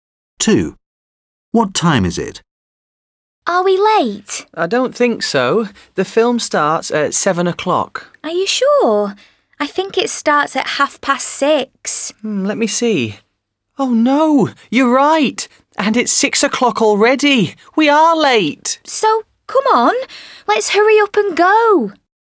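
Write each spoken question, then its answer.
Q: What time is it?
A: 6 o'clock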